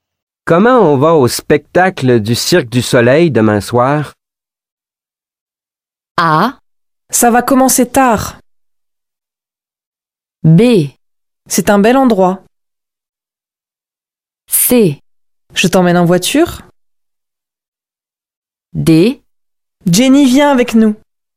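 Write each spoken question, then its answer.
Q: Comment on va au spectacle du Cirque du Soleil demain soir ?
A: C: Je t'emmène en voiture.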